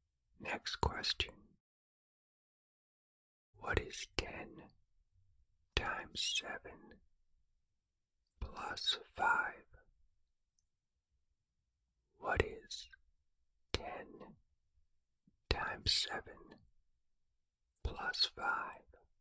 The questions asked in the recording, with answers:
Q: What is 10 times 7 plus 5?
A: The answer is 75.